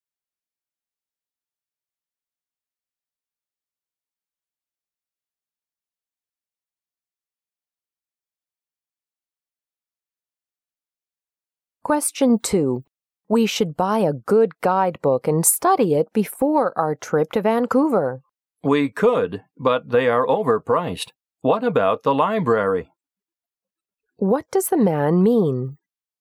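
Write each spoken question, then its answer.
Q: What does the man mean?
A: They could borrow a guidebook from the library instead of buying one.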